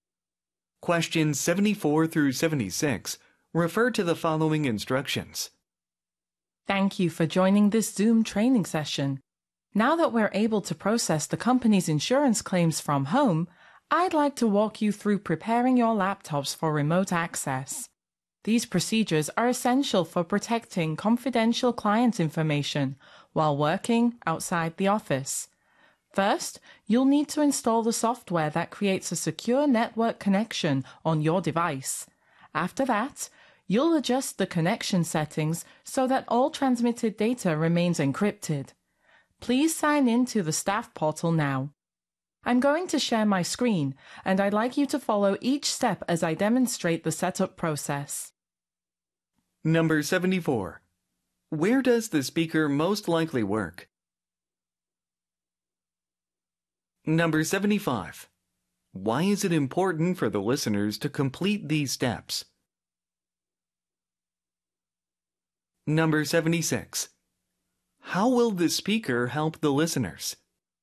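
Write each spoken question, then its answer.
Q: Where does the speaker most likely work?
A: At an insurance company

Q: Why is it important for the listeners to complete these steps?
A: To protect confidential client information

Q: How will the speaker help the listeners?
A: By sharing the screen and demonstrating the setup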